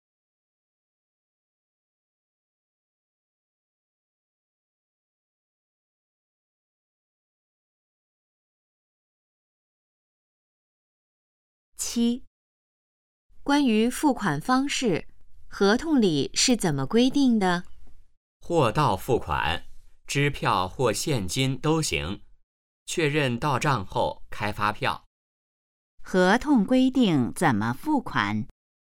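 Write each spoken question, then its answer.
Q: 合同规定怎么付款?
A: 货到付款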